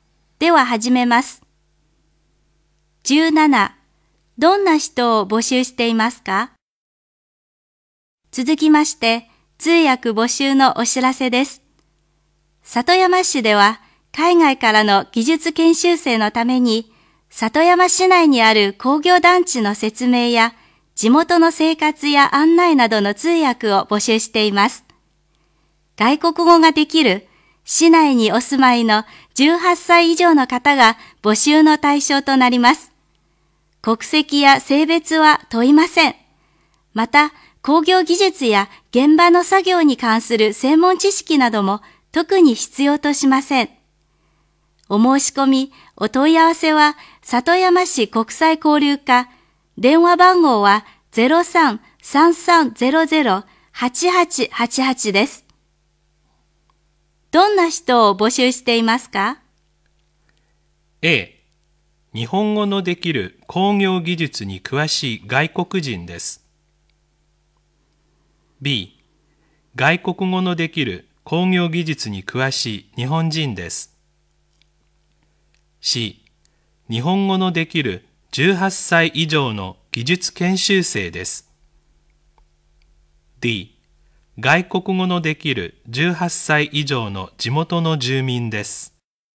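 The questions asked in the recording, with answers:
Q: どんな人を募集していますか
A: D: 外国語のできる18歳以上の地元の住民です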